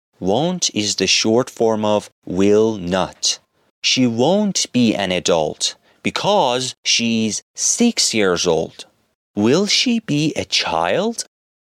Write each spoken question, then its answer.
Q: Will she be a child?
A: Yes, she will be a child because she's only 6 years old.